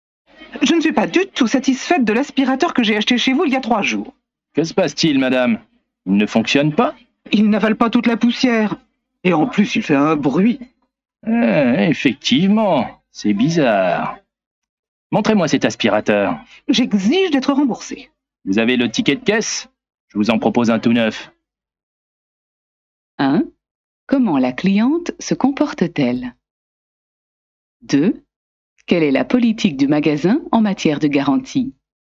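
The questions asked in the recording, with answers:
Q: Comment la cliente se comporte-t-elle?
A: Elle est mécontente et exigeante : elle exige d'être remboursée.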